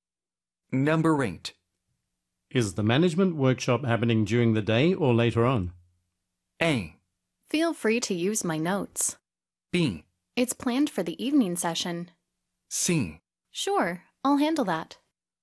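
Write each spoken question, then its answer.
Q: Is the management workshop happening during the day or later on?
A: B: It's planned for the evening session.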